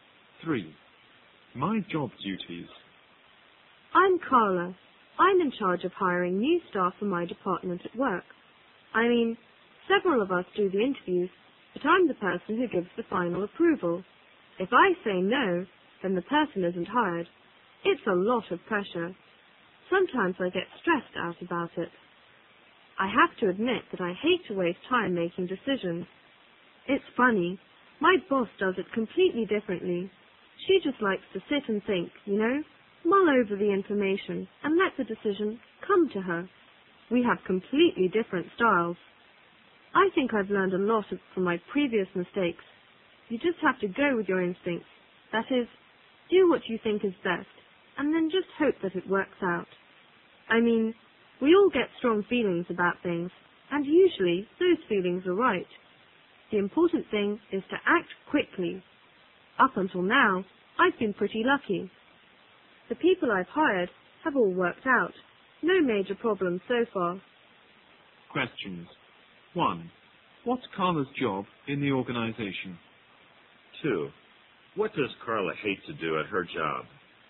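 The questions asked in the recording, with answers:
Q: What's Carla's job in the organization?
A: She is in charge of hiring new staff for her department

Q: What does Carla hate to do at her job?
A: Waste time making decisions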